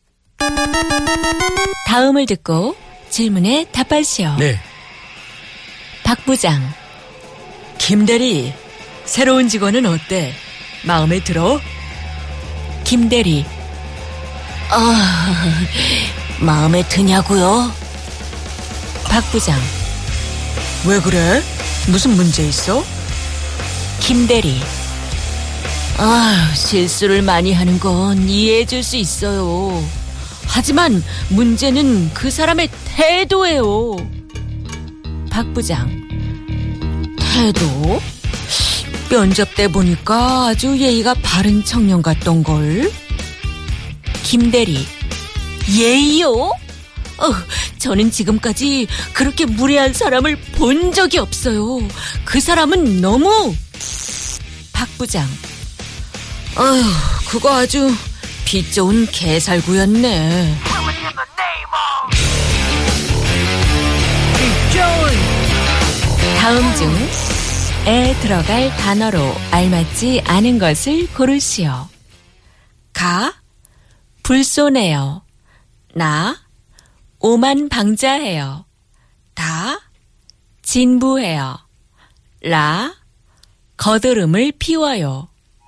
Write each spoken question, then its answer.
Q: 다음 중... 에 들어갈 단어로 알맞지 않은 것을 고르시오.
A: It's actually Da.